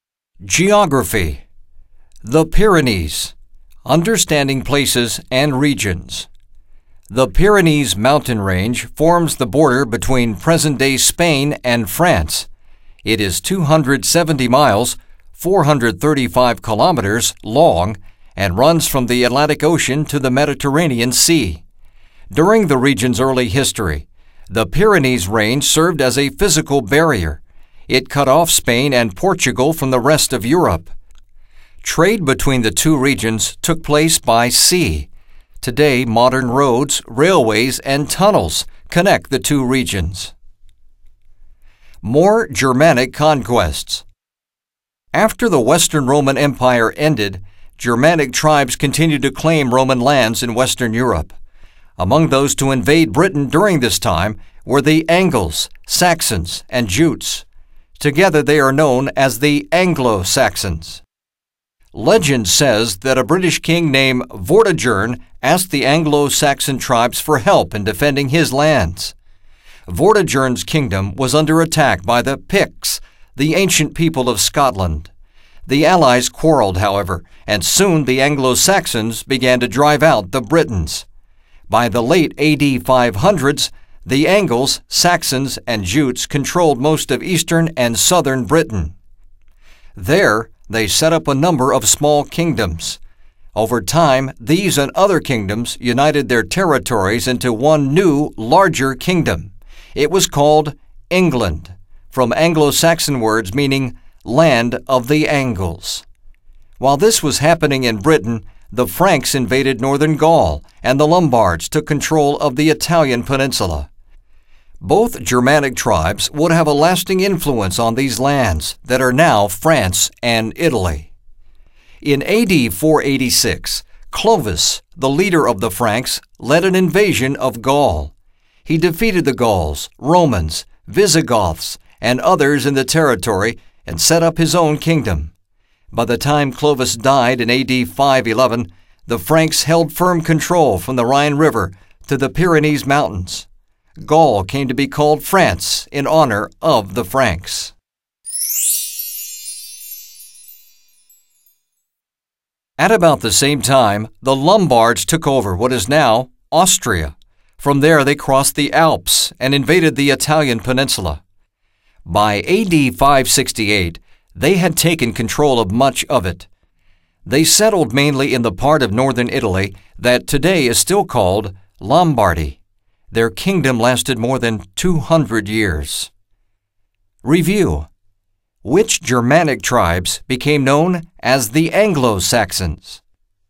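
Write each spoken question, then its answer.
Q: Which Germanic tribes became known as the Anglo-Saxons?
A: The Angles, Saxons, and Jutes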